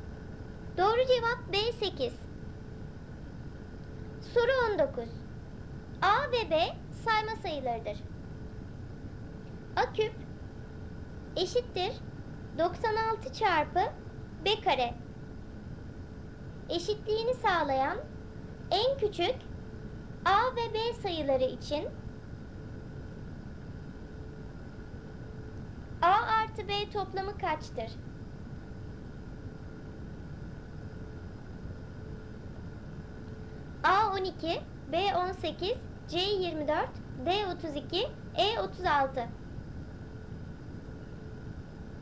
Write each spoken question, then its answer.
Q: A artı B toplamı kaçtır?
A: Doğru cevap E36.